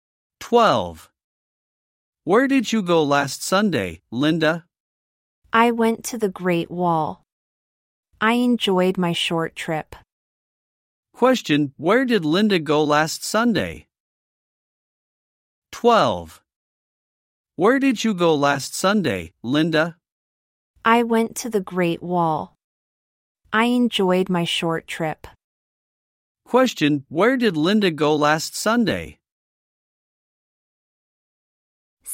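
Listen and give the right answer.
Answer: The Great Wall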